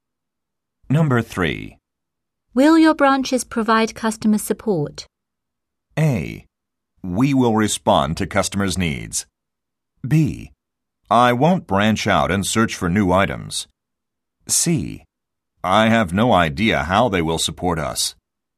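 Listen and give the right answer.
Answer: A: We will respond to customers' needs.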